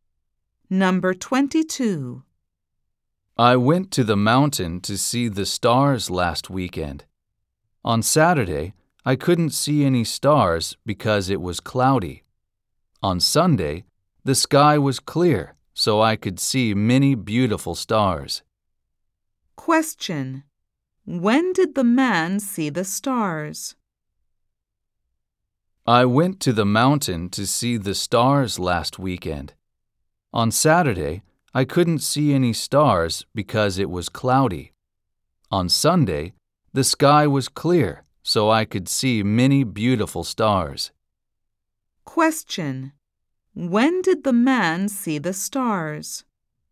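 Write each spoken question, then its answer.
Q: When did the man see the stars?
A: On Sunday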